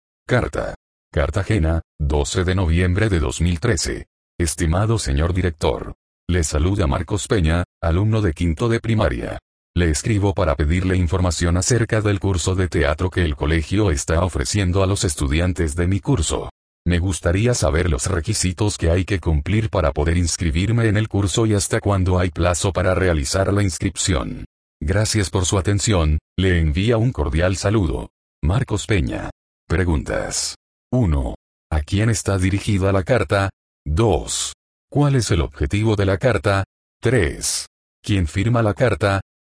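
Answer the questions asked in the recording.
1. Al director del colegio
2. Pedir información sobre el curso de teatro (requisitos y plazo de inscripción)
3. Marcos Peña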